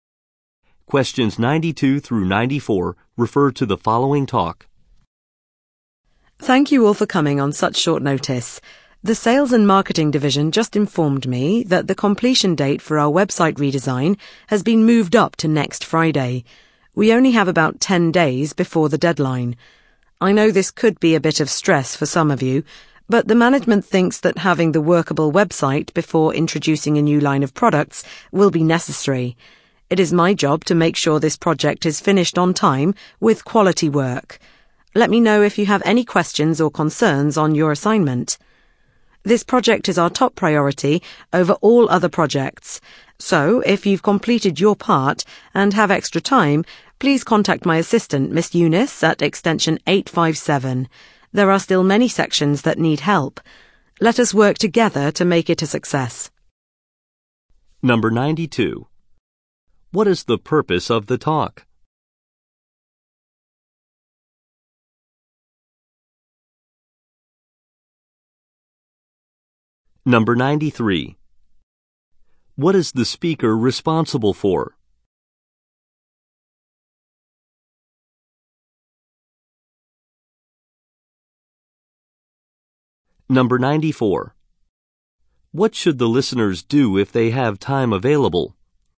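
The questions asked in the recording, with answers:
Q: What is the purpose of the talk?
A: To announce that the website redesign deadline was moved up

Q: What is the speaker responsible for?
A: Making sure the project is finished on time

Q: What should the listeners do if they have time available?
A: Contact Miss Eunice at extension 857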